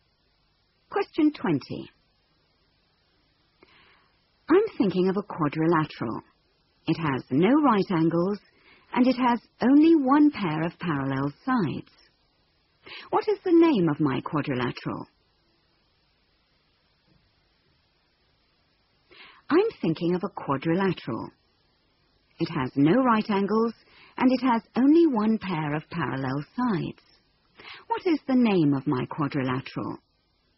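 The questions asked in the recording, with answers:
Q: What is the name of my quadrilateral?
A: Trapezium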